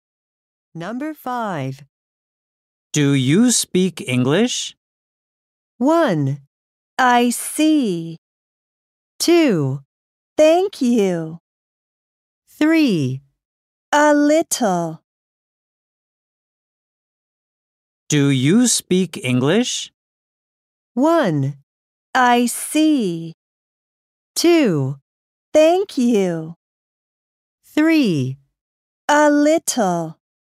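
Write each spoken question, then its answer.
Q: Do you speak English?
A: 3: A little.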